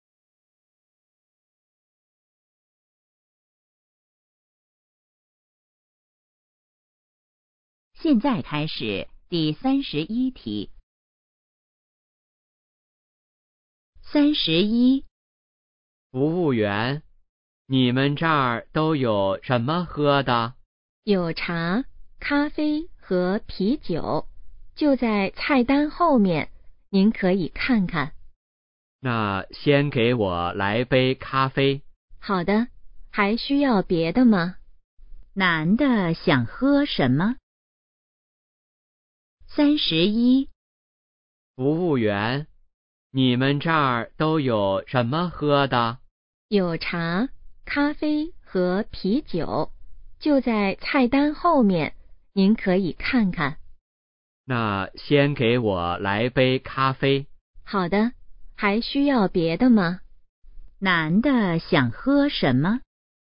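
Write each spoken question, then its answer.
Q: 男的想喝什么?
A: 咖啡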